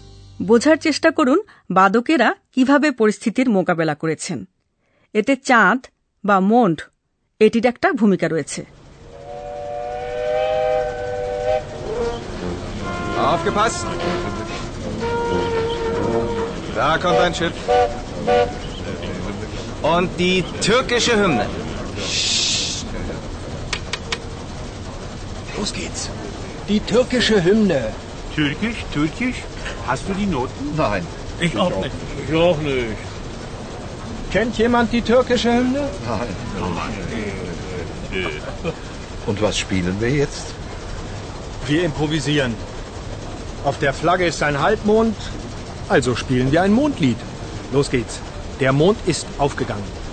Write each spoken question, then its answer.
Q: বোঝার চেষ্টা করুন বাদকেরা কিভাবে পরিস্থিতির মোকাবেলা করেছেন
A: আপনারা হয়তো বুঝতে পেরেছেন যে বাদকেরা তাৎক্ষণিকভাবে একটা কিছু বাজিয়েছেন